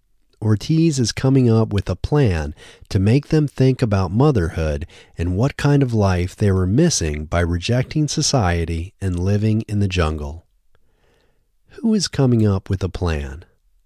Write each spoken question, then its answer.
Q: Who is coming up with a plan?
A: Ortiz is coming up with a plan.